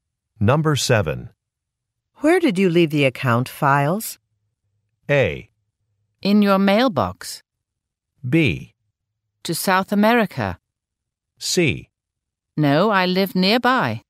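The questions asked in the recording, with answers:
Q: Where did you leave the account files?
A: A: In your mailbox.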